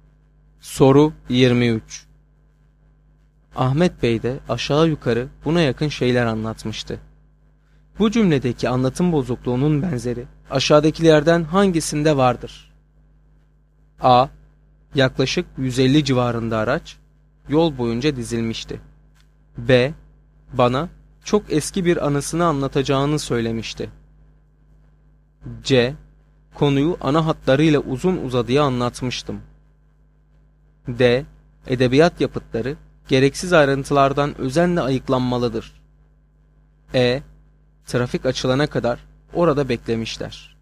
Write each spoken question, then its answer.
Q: Bu cümledeki anlatım bozukluğunun benzeri aşağıdakilerden hangisinde vardır?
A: Doğru cevap A şıkkı.